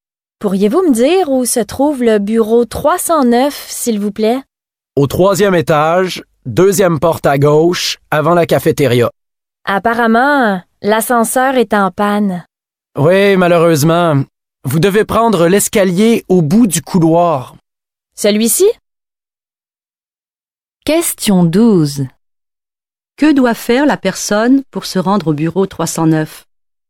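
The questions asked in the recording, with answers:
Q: Que doit faire la personne pour se rendre au bureau 309?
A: Prendre l'escalier au bout du couloir et monter au troisième étage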